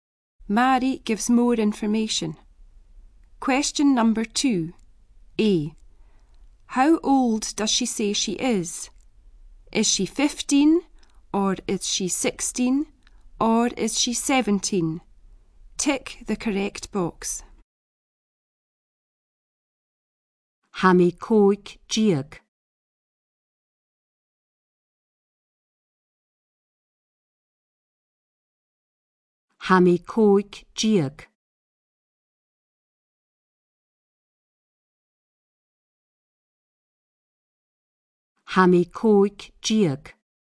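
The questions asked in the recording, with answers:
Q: How old does she say she is?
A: A: 15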